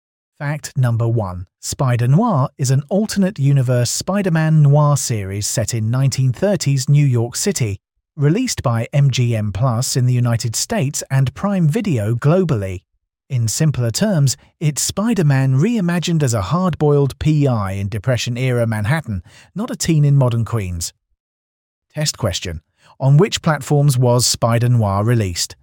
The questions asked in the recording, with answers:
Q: On which platforms was Spider-Noir released?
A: MGM Plus and Prime Video.